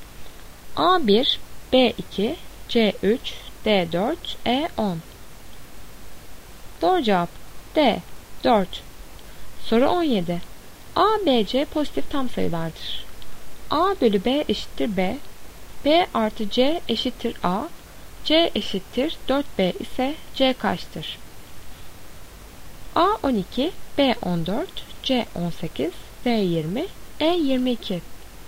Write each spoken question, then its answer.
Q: C eşittir 4B ise C kaçtır?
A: Doğru cevap D 20.